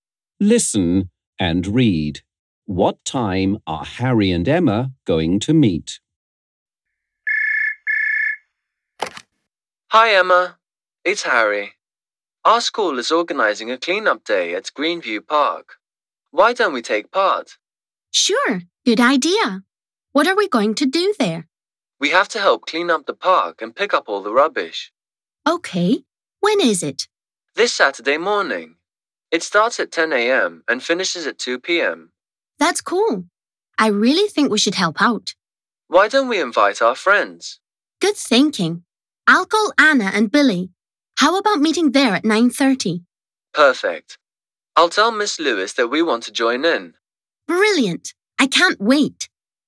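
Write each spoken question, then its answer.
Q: What time are Harry and Emma going to meet?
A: At 9:30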